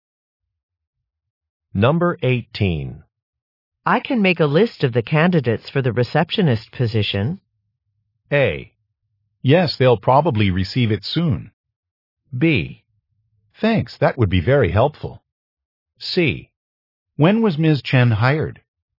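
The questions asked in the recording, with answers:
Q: I can make a list of the candidates for the receptionist position.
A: B: Thanks, that would be very helpful.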